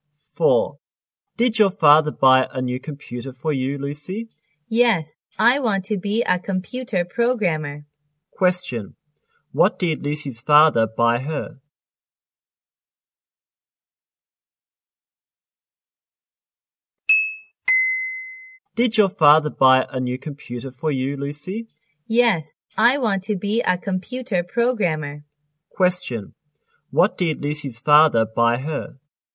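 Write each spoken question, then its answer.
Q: What did Lucy's father buy her?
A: A new computer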